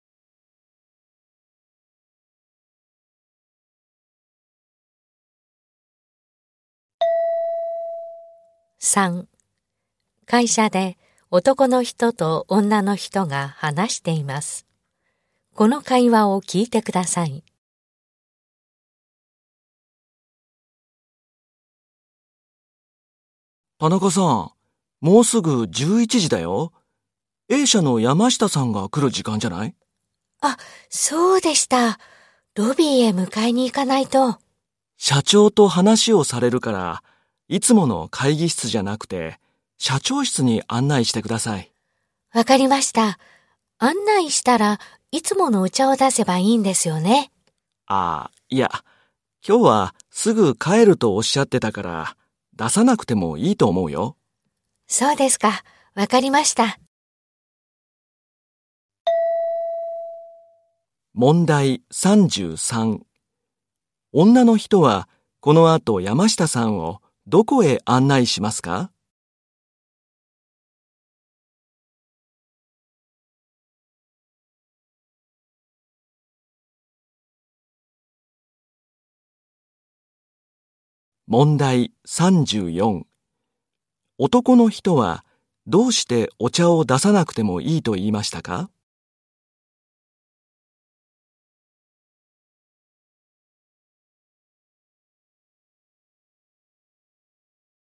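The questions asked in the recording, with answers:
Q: 女の人はこの後山下さんをどこへ案内しますか?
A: 社長室

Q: 男の人はどうしてお茶を出さなくてもいいと言いましたか?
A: 山下さんがすぐ帰ると言っていたから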